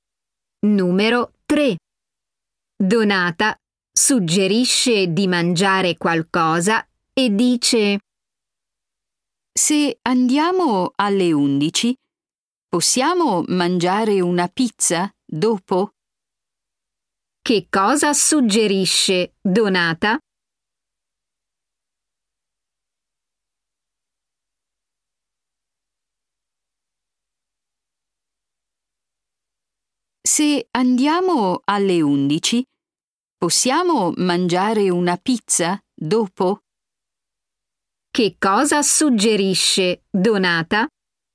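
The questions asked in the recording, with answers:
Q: Che cosa suggerisce Donata?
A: mangiare una pizza dopo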